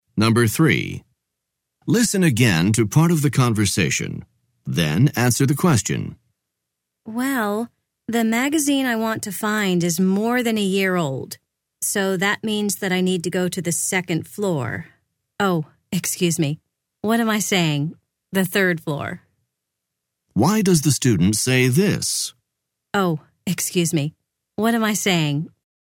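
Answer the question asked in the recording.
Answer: To correct her mistake: the old magazines are on the third floor, not the second floor.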